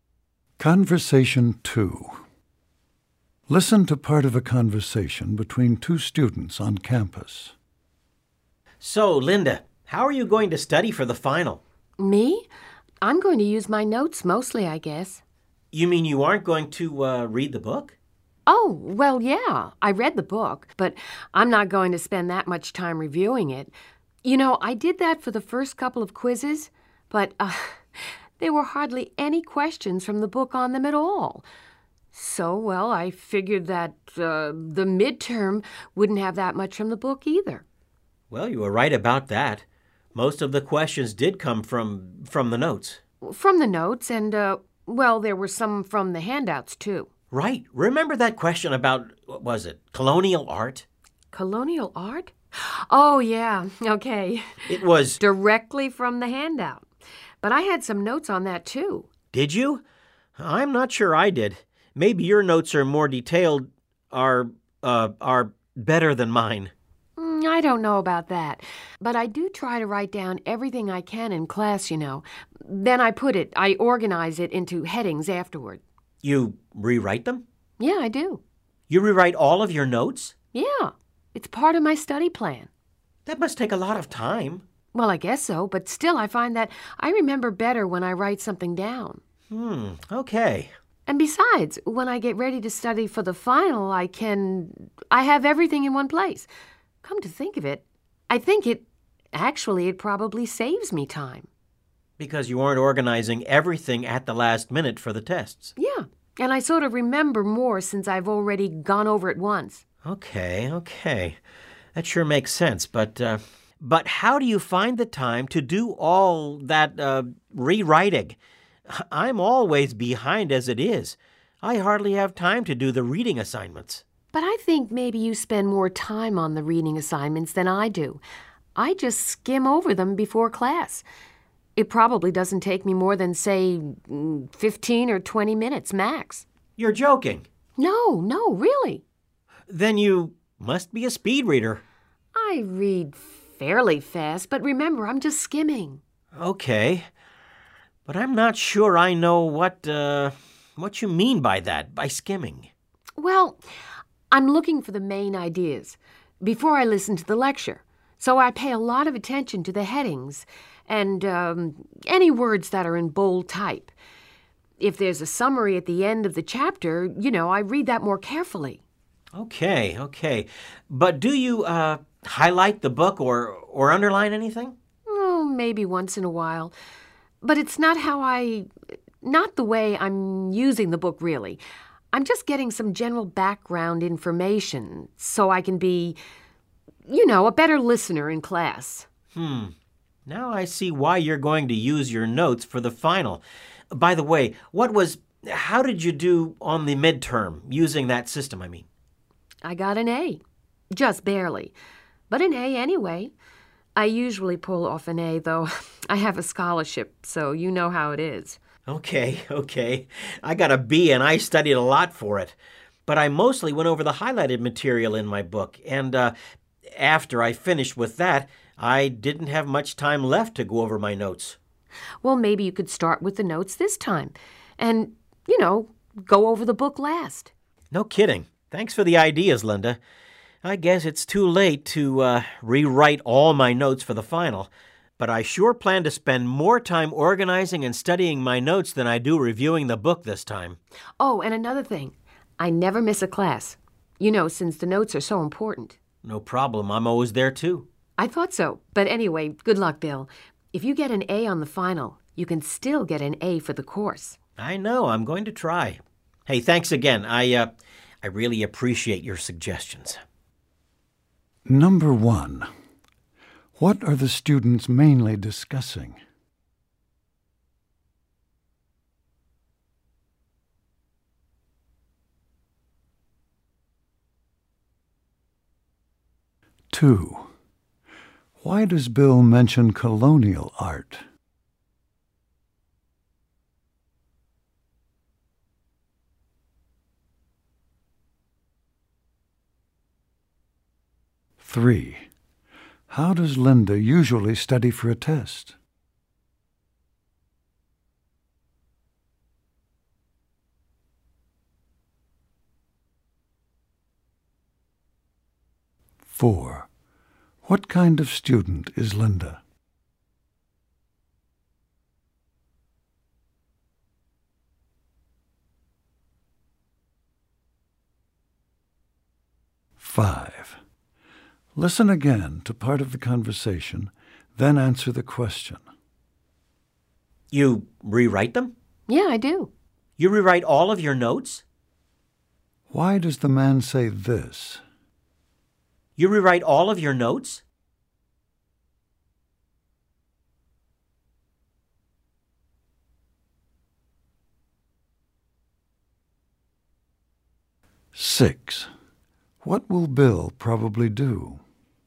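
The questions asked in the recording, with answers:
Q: What are the students mainly discussing?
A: How to study for the final exam

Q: Why does Bill mention colonial art?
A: As an example of a midterm question that came from the handout

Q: How does Linda usually study for a test?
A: She studies her rewritten, organized class notes

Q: What kind of student is Linda?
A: An excellent student who usually gets A's and has a scholarship

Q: What will Bill probably do?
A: Spend more time organizing and studying his notes than reviewing the book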